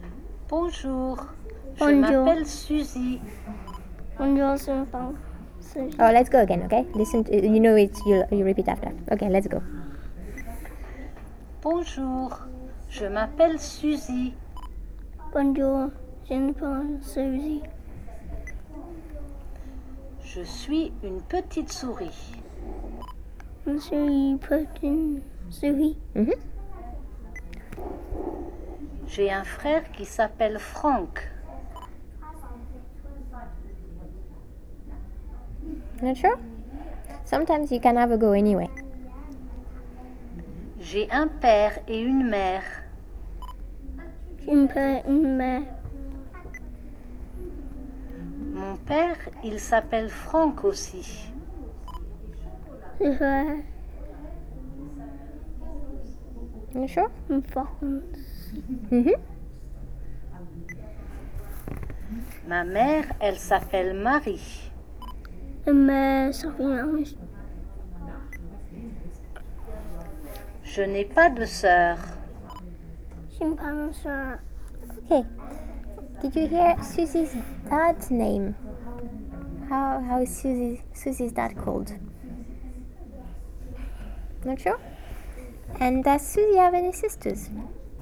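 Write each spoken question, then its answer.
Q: How is Susie's dad called?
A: Franck

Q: And does Suzy have any sisters?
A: No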